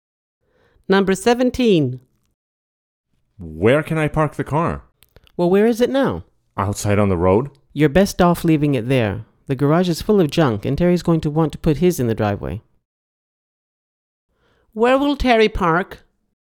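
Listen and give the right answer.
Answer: In the driveway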